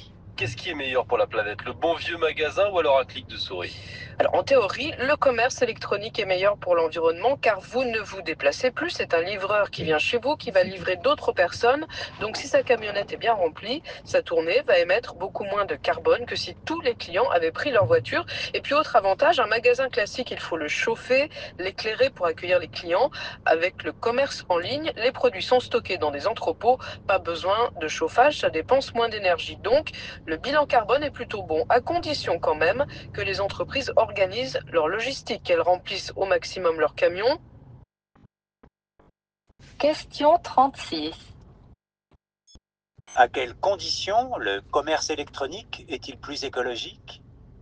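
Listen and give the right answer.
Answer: Si les entreprises organisent bien leur logistique et remplissent au maximum leurs camions.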